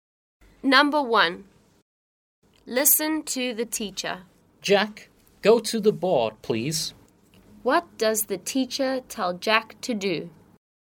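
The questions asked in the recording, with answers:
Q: What does the teacher tell Jack to do?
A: Go to the board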